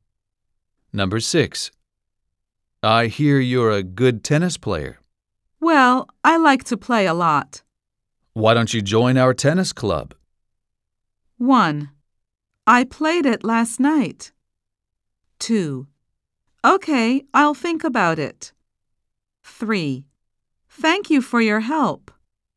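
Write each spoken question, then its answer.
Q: Why don't you join our tennis club?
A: 2: Okay, I'll think about it.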